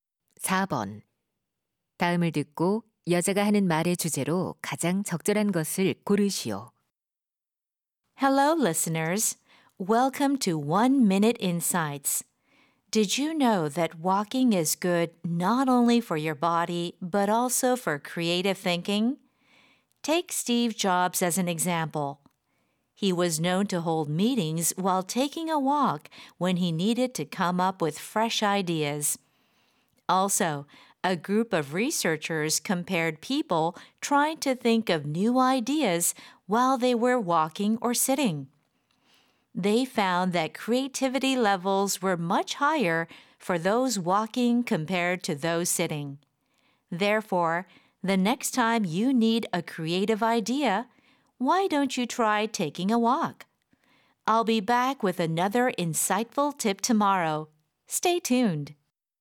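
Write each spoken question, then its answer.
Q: 다음을 듣고 여자가 하는 말의 주제로 가장 적절한 것을 고르시오.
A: 걷기가 창의적 사고에 도움이 된다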